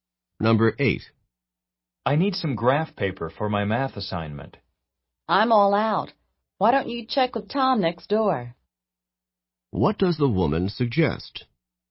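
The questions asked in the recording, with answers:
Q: What does the woman suggest?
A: Asking Tom next door for graph paper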